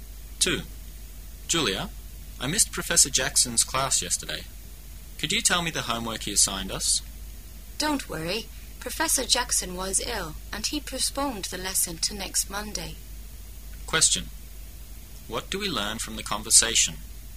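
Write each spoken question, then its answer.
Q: What do we learn from the conversation?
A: Professor Jackson was ill and postponed the lesson to next Monday, so there is no homework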